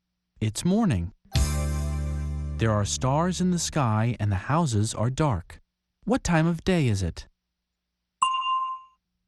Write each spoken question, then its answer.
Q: What time of day is it?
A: It's night.